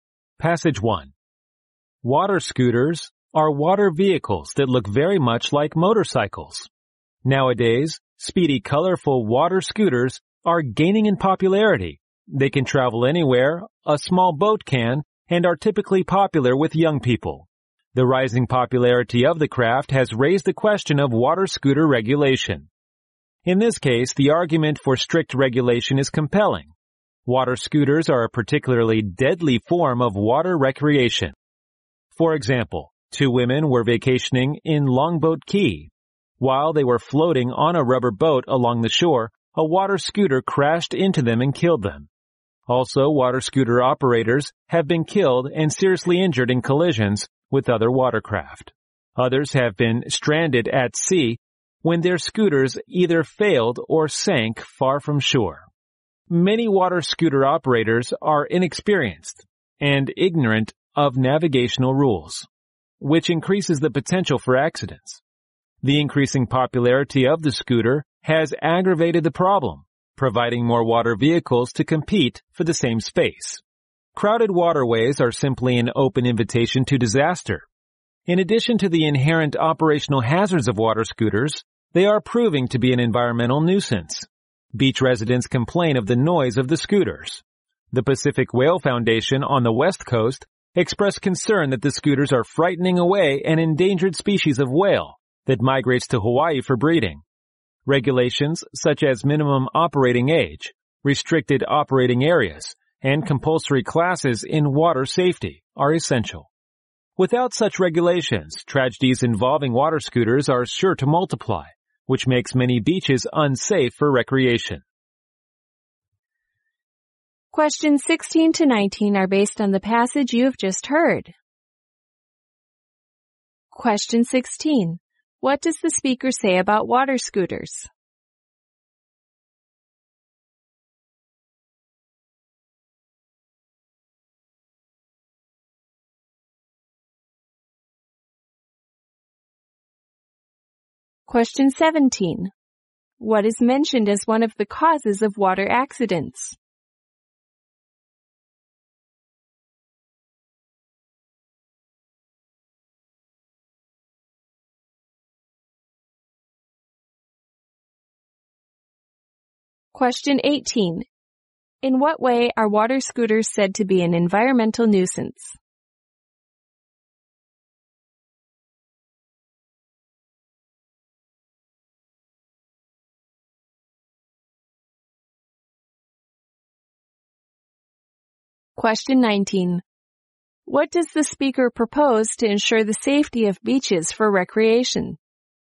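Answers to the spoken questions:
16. They are dangerous and should be strictly regulated.
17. Operators who are inexperienced and don't know the navigation rules.
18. They are noisy and frighten away endangered whales.
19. Regulations such as a minimum operating age, restricted areas and compulsory water safety classes.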